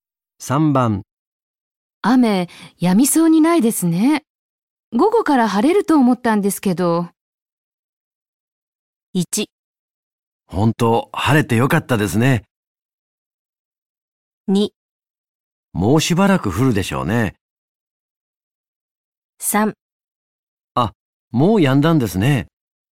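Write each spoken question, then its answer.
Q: 雨、止みそうにないですね。午後から晴れると思ったんですけど。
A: 2: もうしばらく降るでしょうね。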